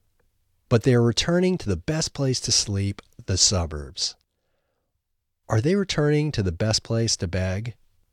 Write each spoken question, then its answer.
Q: Are they returning to the best place to beg?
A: No, they aren't returning to the best place to beg, they're returning to the best place to sleep.